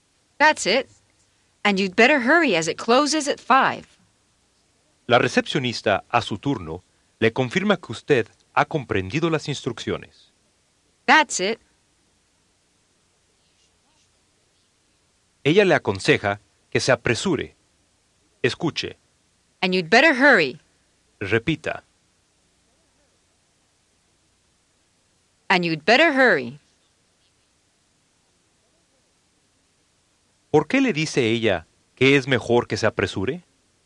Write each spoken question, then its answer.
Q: ¿Por qué le dice ella que es mejor que se apresure?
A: As it closes at 5.